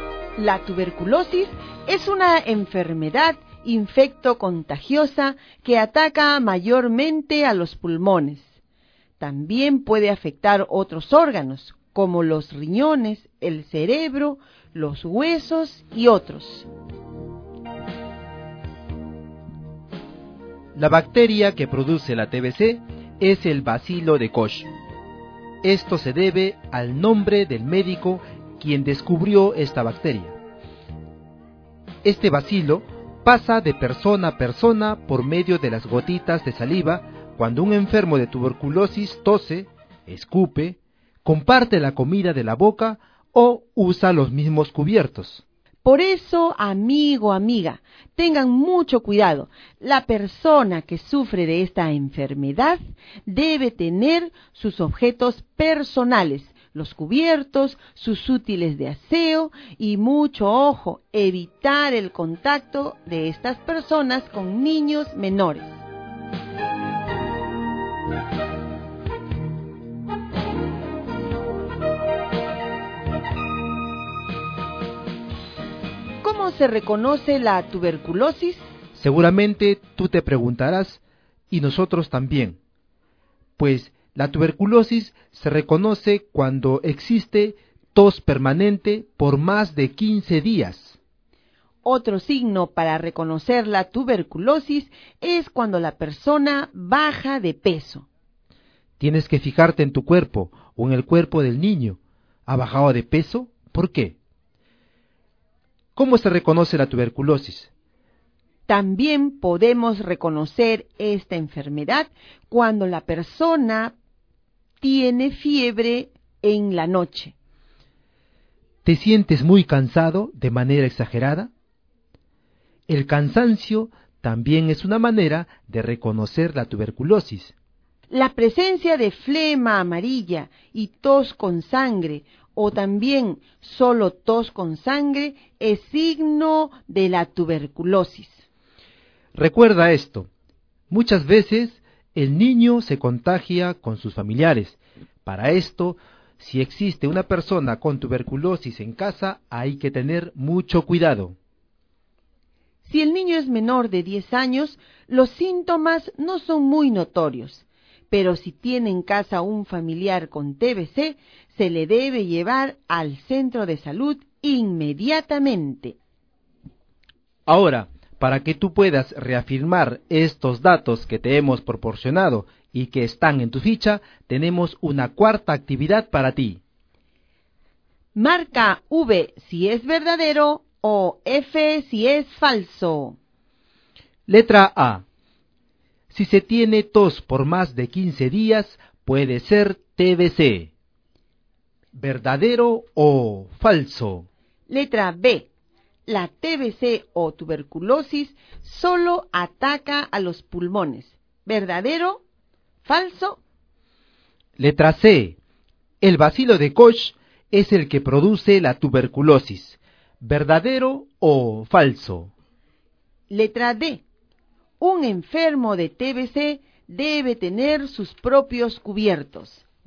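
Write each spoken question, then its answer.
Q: Letra A. Si se tiene tos por más de 15 días, puede ser TBC.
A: Verdadero

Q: Letra B. La TBC o tuberculosis solo ataca a los pulmones.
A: Falso

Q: Letra C. El bacilo de Koch es el que produce la tuberculosis.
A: Verdadero

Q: Letra D. Un enfermo de TBC debe tener sus propios cubiertos.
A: Verdadero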